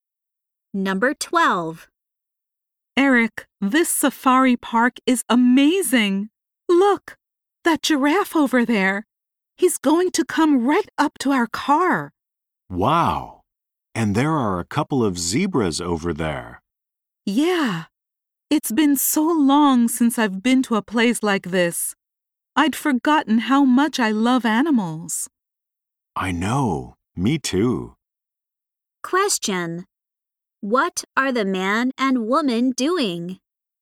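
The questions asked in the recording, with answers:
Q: What are the man and woman doing?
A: Visiting a safari park.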